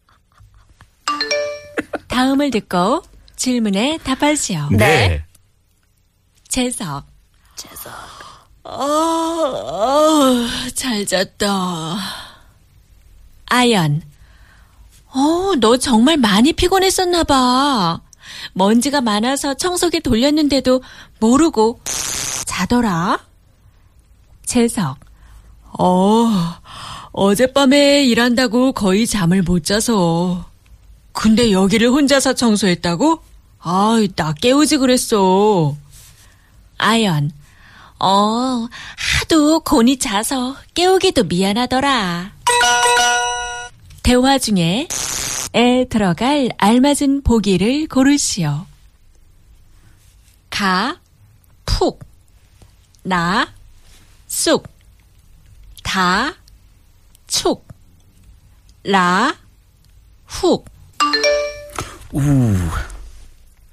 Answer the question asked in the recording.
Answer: 가, 푹, used in front of sleep or rest to emphasize how well someone rested or slept.